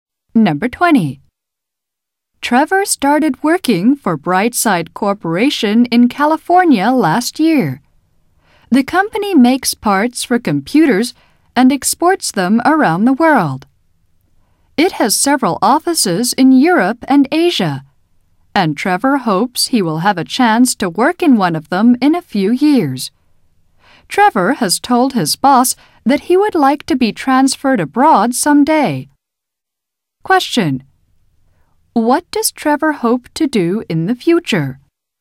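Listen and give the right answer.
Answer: Work in one of the company's offices abroad (in Europe or Asia).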